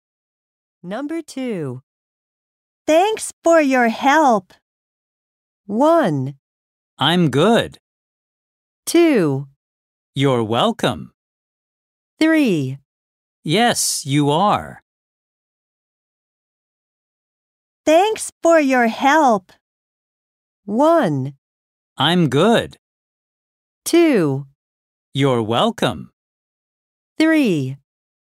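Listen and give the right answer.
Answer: 2: You're welcome.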